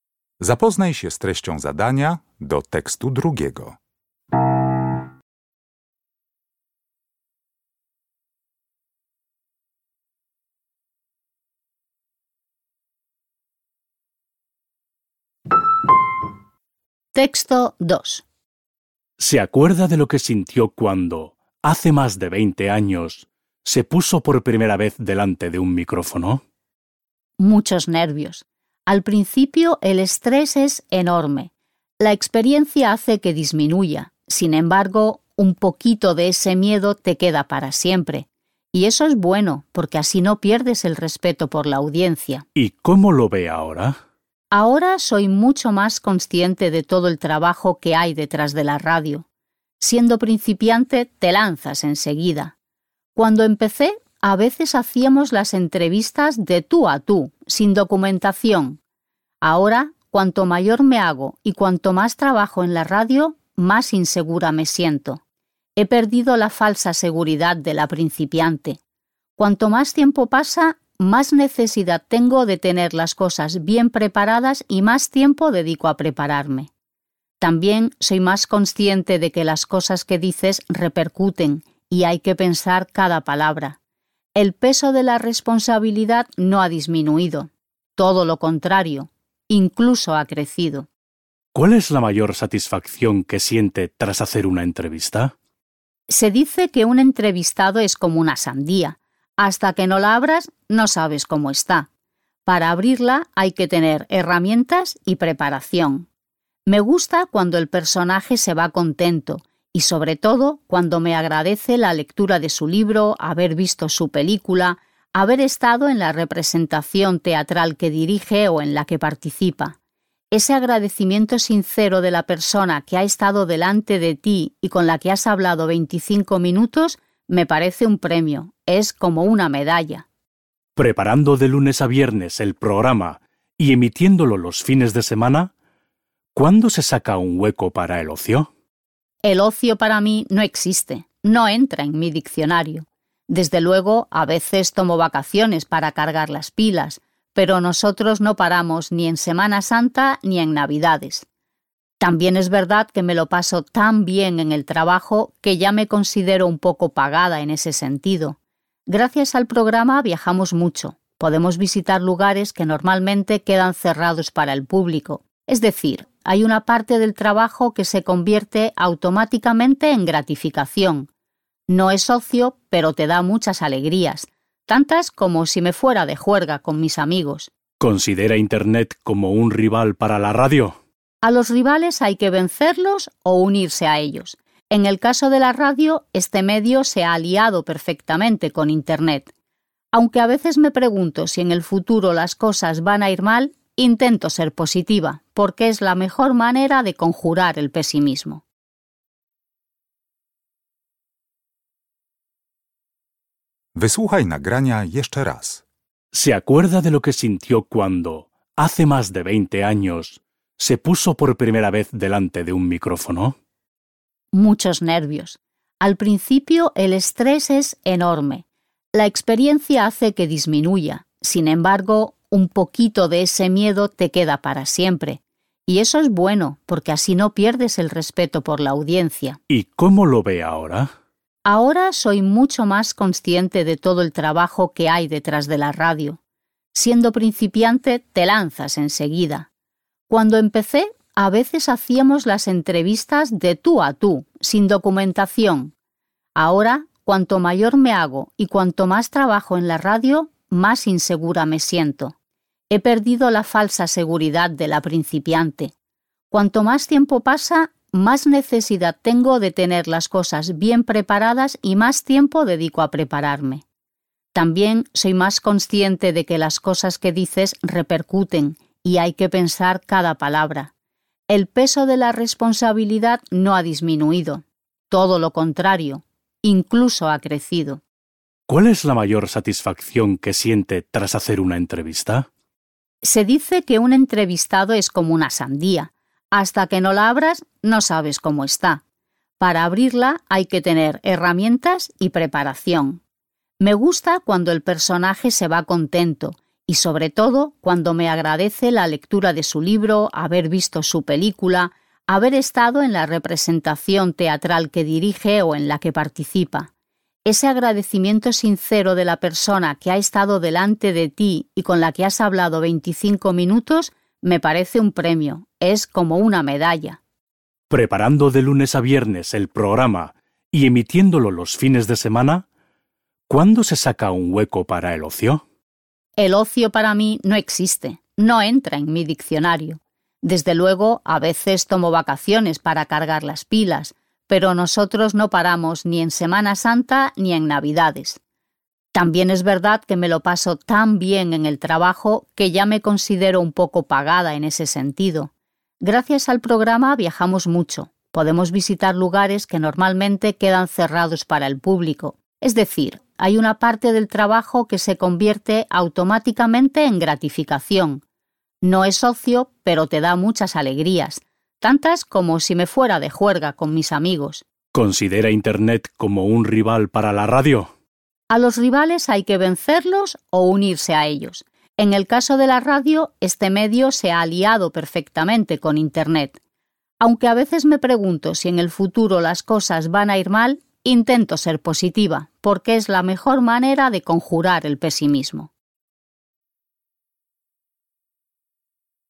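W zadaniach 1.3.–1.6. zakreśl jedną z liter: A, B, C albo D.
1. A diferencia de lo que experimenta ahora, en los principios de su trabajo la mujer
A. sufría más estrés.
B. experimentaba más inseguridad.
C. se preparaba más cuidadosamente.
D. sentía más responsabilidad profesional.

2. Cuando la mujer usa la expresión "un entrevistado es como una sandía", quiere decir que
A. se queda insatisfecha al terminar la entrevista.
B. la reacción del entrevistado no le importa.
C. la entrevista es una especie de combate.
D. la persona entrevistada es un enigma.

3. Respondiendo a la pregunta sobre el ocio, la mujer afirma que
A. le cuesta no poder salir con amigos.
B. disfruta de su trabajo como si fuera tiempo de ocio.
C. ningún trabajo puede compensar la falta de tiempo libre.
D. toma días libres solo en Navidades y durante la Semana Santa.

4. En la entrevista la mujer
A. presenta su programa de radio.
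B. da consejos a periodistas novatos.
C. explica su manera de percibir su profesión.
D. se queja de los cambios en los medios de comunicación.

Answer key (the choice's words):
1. sufría más estrés.
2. la persona entrevistada es un enigma.
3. disfruta de su trabajo como si fuera tiempo de ocio.
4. explica su manera de percibir su profesión.

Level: Poziom: rozszerzony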